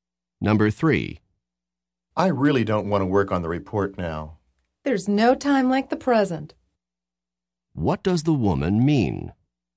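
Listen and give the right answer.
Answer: He should work on the report now.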